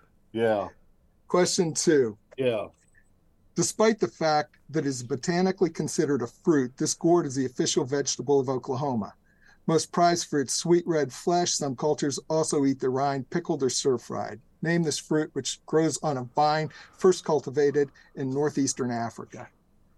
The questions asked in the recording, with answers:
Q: Name this fruit, which grows on a vine first cultivated in northeastern Africa.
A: A watermelon.